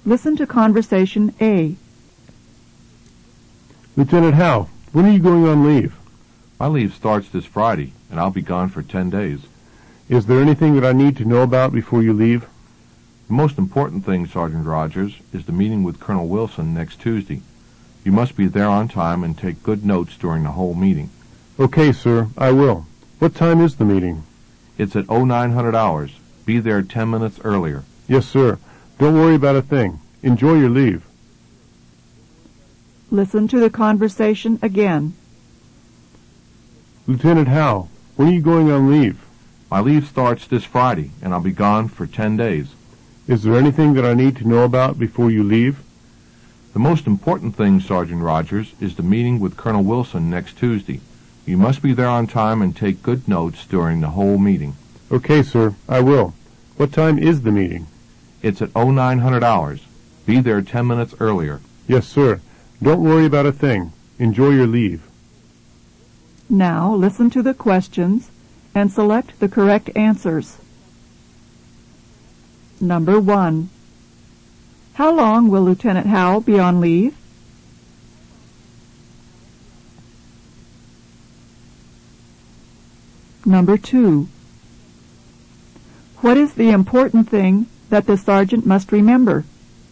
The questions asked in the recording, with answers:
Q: How long will Lieutenant Howe be on leave?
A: Number 1 is B. He'll be on leave for 10 days.

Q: What is the important thing that the sergeant must remember?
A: Number 2 is C. The important thing is the meeting with Colonel Wilson.